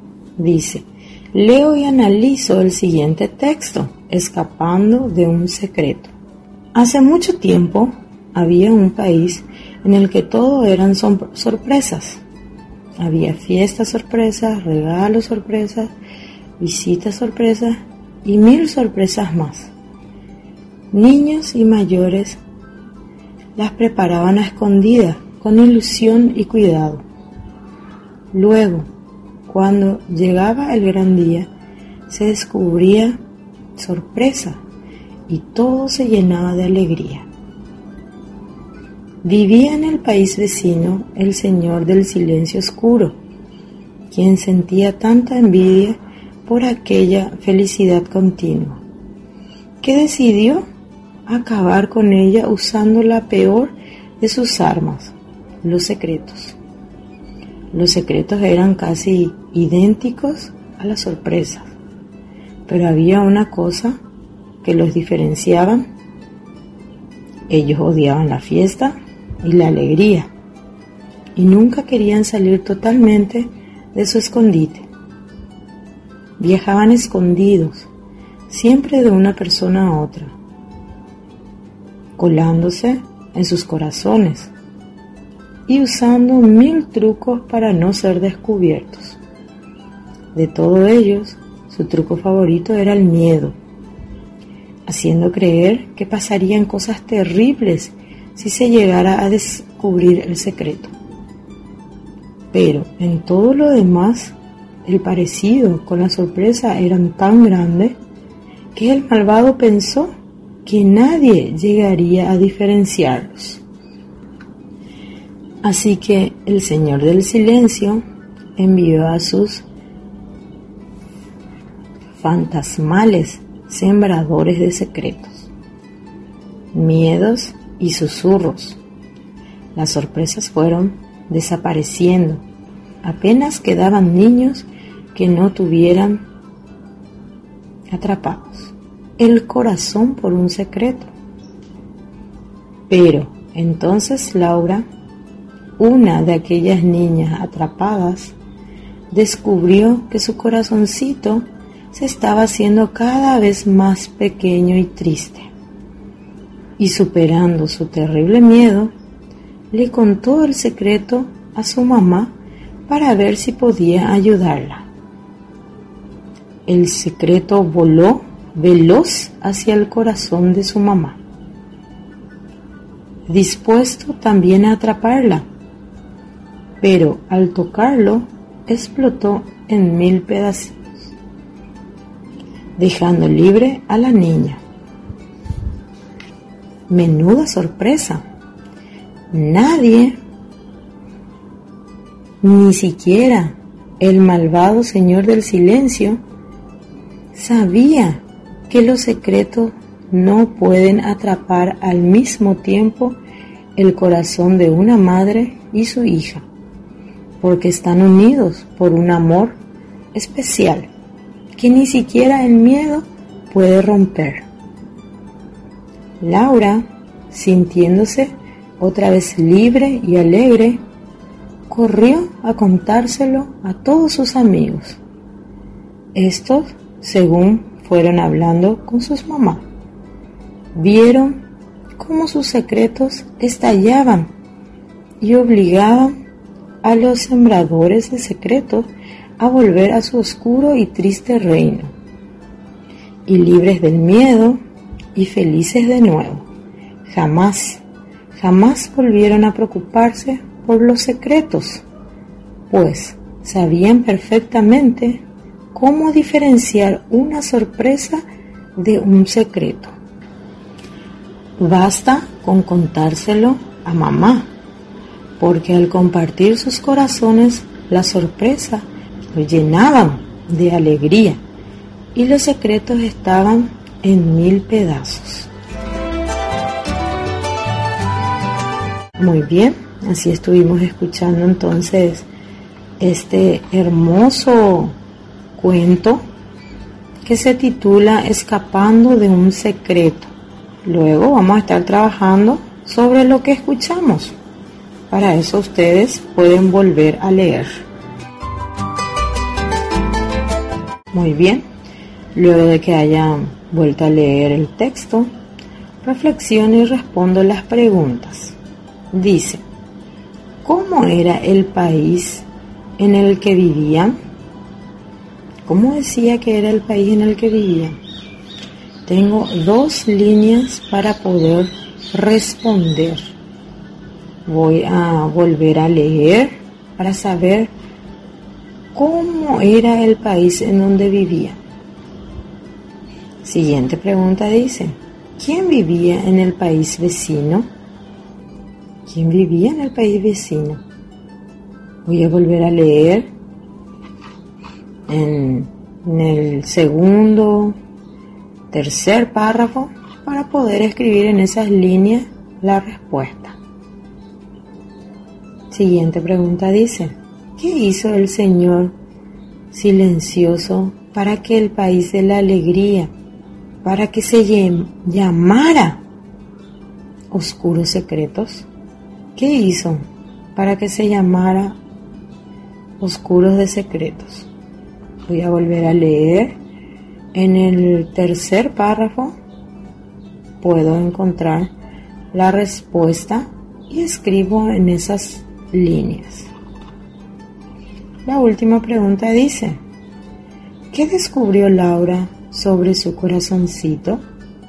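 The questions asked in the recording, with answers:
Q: ¿cómo era el país en el que vivían?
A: Un país en el que todo eran sorpresas

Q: ¿quién vivía en el país vecino?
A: El señor del silencio oscuro

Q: ¿qué descubrió Laura sobre su corazoncito?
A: Que se estaba haciendo cada vez más pequeño y triste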